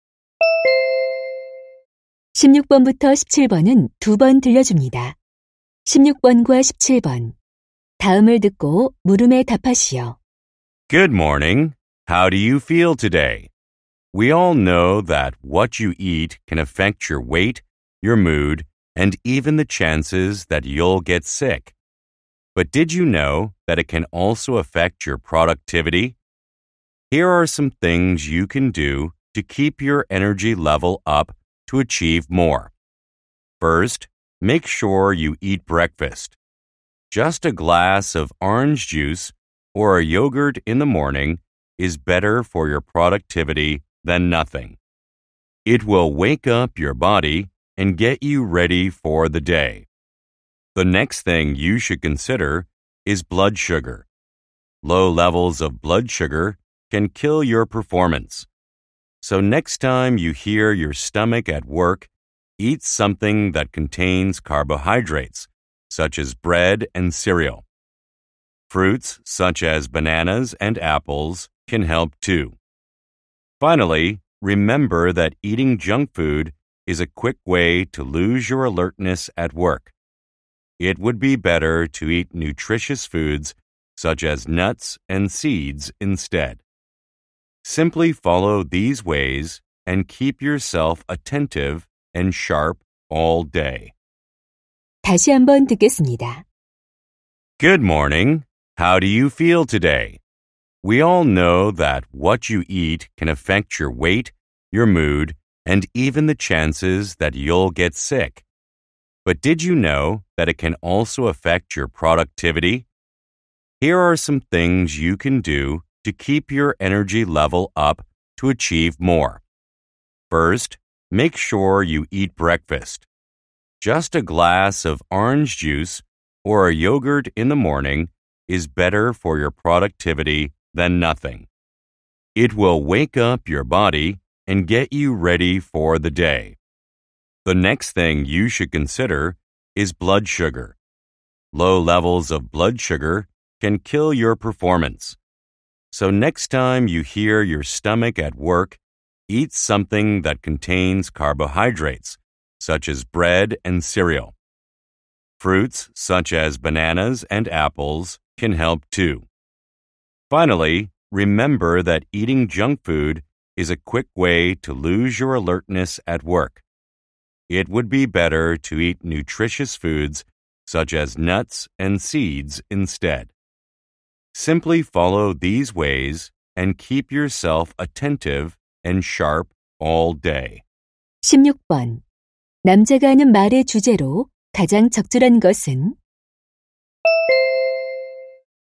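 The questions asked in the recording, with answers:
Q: 남자가 하는 말의 주제로 가장 적절한 것은?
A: 업무 생산성을 높이는 식습관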